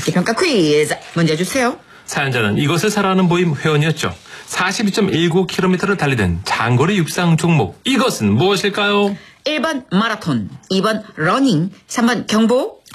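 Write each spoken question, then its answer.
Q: 사연자는 이것을 사랑하는 모임 회원이었죠. 42.19km를 달리던 장거리 육상 종목. 이것은 무엇일까요?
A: 1번: 마라톤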